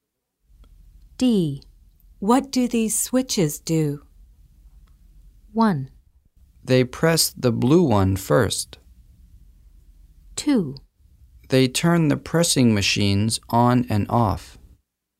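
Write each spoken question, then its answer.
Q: What do these switches do?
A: 2: They turn the pressing machines on and off.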